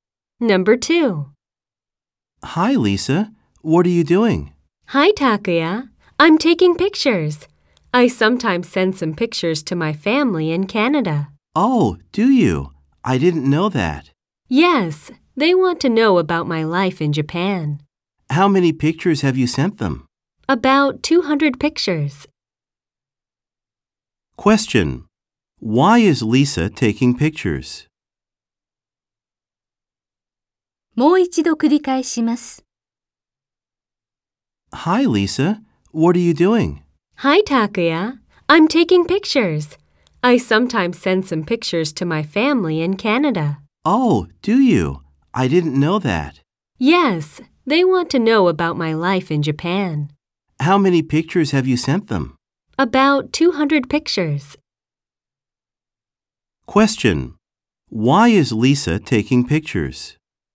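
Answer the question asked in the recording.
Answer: To send them to her family in Canada.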